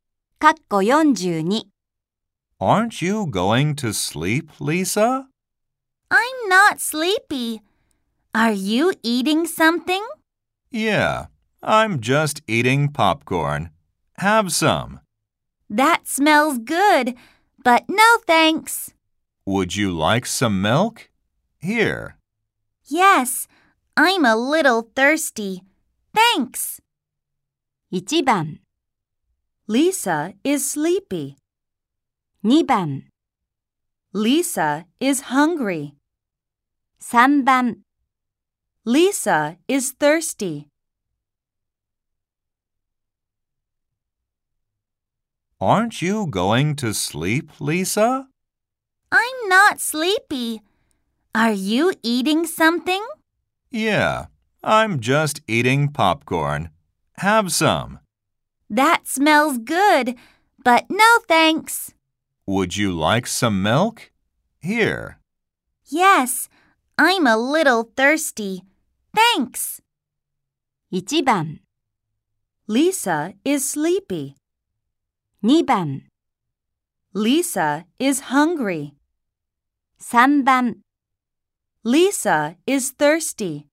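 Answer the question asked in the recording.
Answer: 3: Lisa is thirsty.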